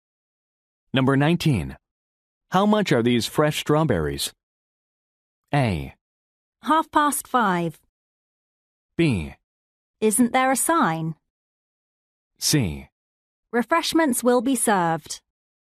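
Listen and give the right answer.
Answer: B: Isn't there a sign?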